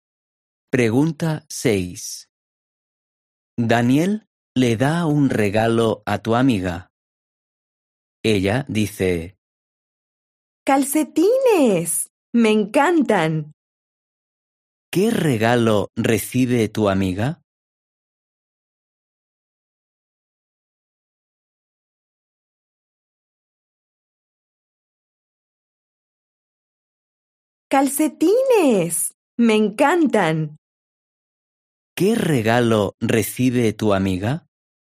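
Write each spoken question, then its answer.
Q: ¿Qué regalo recibe tu amiga?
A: Calcetines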